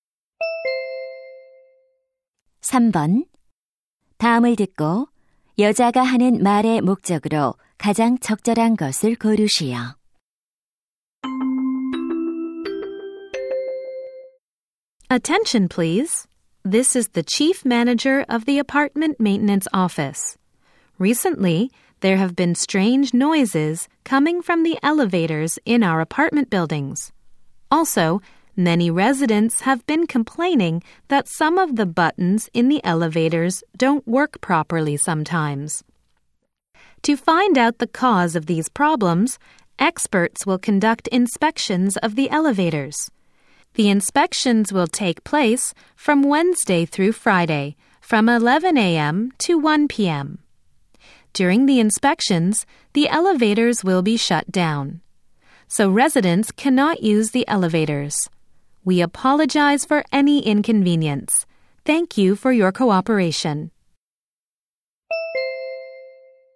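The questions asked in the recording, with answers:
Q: 다음을 듣고 여자가 하는 말의 목적으로 가장 적절한 것을 고르시오.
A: 엘리베이터 점검 일정과 운행 중단을 안내하려고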